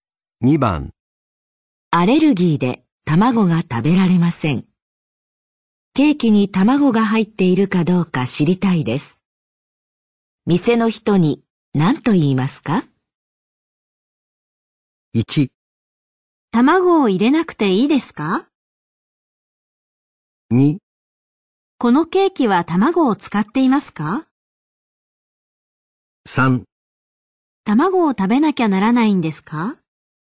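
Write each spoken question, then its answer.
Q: 店の人に何と言いますか?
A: 2: このケーキは卵を使っていますか?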